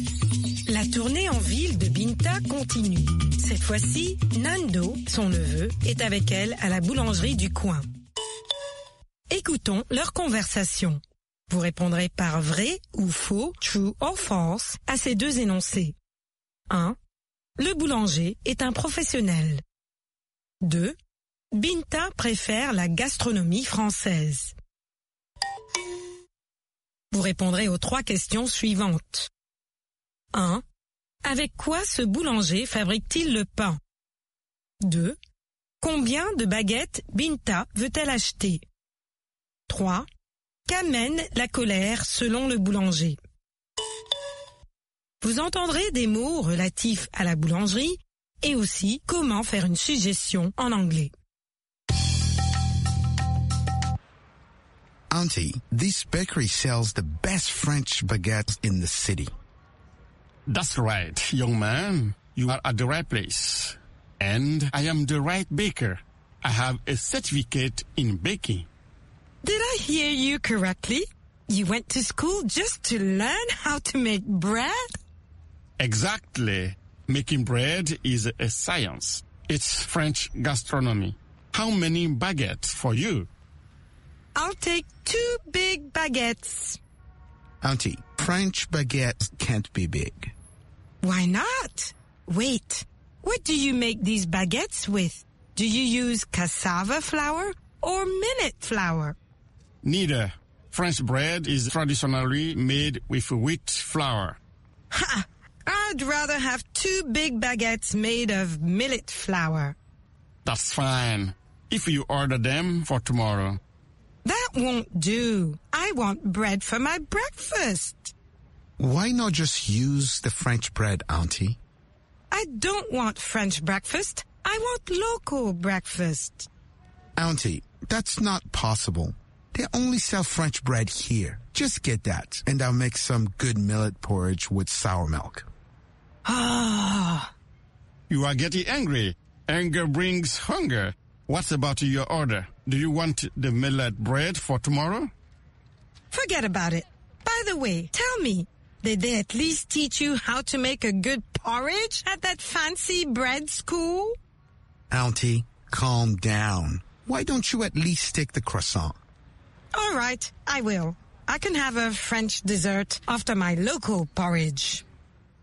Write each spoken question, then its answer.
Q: Le boulanger est un professionnel.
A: L'énoncé 1 est vrai. Le boulanger est un professionnel.

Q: Binta préfère la gastronomie française.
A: L'énoncé 2 est faux. Binta préfère la gastronomie française.

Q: Avec quoi ce boulanger fabrique-t-il le pain?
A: De la farine de blé.

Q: Combien de baguettes Binta veut-elle acheter?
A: 2 baguettes.

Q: Qu'amène la colère selon le boulanger?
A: La colère amène la faim.